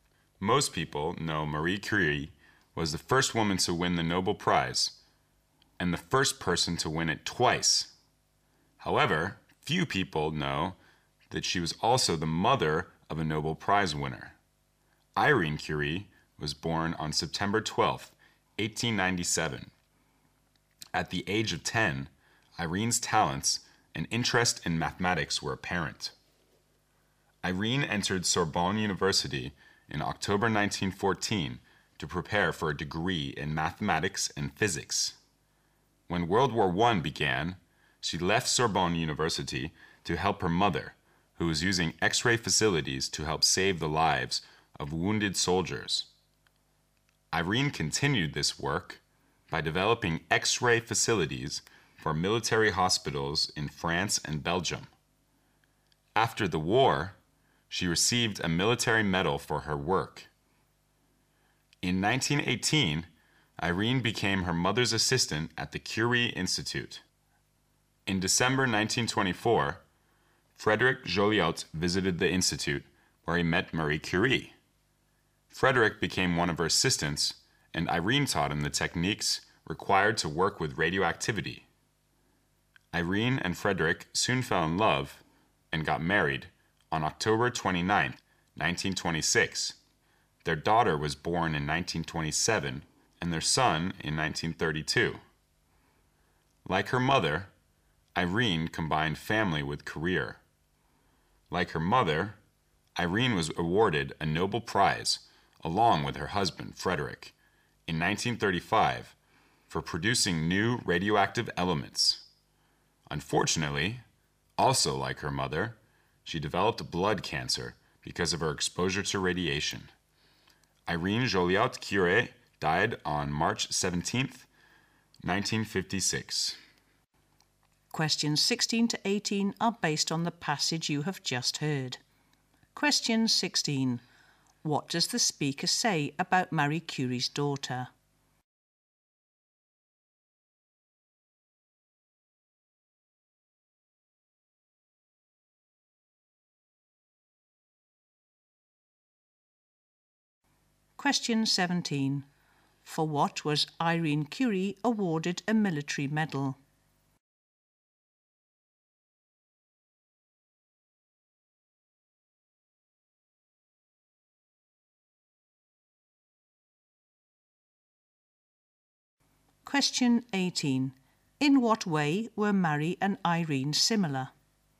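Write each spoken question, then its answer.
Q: What does the speaker say about Marie Curie's daughter?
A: She was also a Nobel Prize winner

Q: For what was Irene Curie awarded a military medal?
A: Developing X-ray facilities for military hospitals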